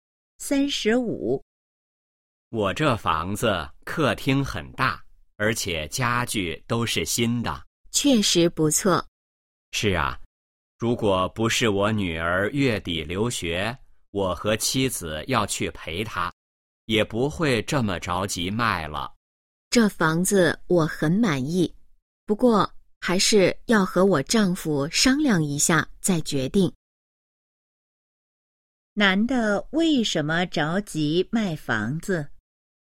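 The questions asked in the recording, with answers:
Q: 男的为什么着急卖房子?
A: 女儿月底要去留学,他和妻子要去陪她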